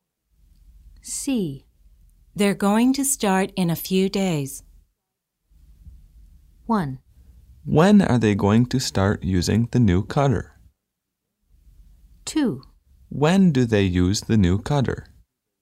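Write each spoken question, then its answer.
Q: They're going to start in a few days.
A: 1: When are they going to start using the new cutter?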